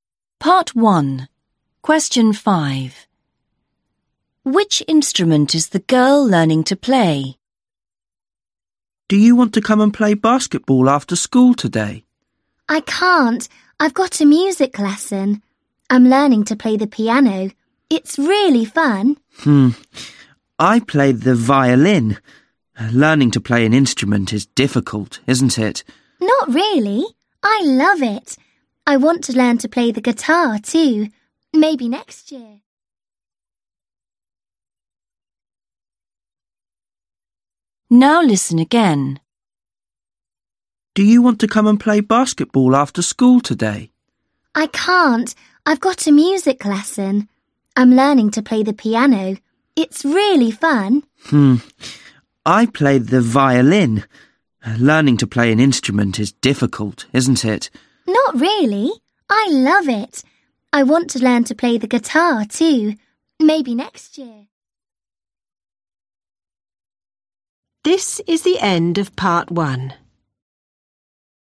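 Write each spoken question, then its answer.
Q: Which instrument is the girl learning to play?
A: the piano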